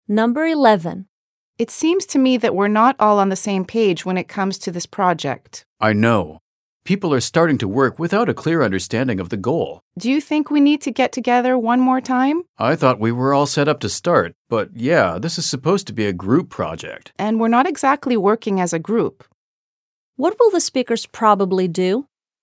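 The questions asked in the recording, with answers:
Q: What will the speakers probably do?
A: Get the group together for another meeting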